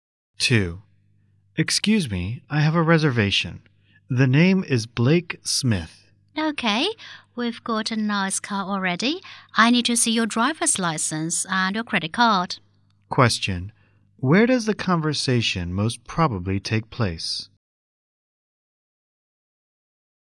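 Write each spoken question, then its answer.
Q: Where does the conversation most probably take place?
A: At a car rental office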